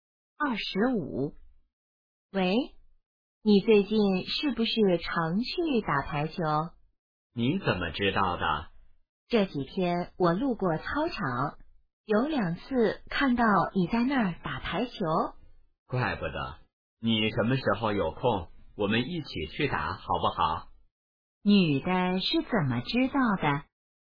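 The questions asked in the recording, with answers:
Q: 女的是怎么知道的?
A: 她路过操场时看到男的在打排球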